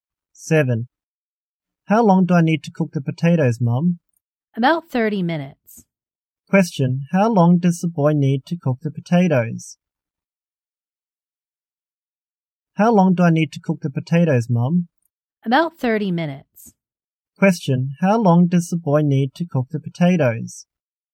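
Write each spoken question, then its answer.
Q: How long does the boy need to cook the potatoes?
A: About 30 minutes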